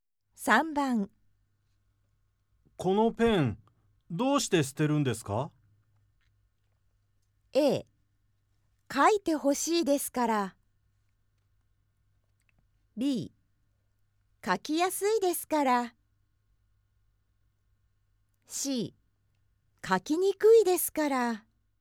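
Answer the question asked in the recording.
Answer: C: 書きにくいですから。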